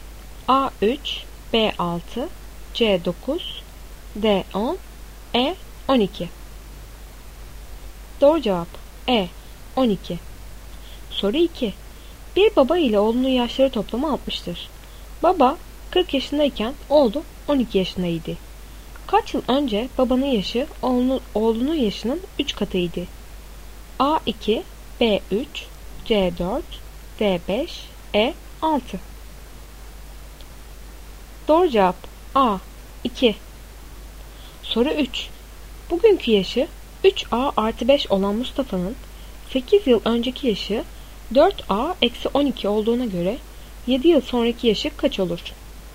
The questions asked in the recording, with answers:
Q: Kaç yıl önce babanın yaşı oğlunun yaşının 3 katıydı?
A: Doğru cevap A 2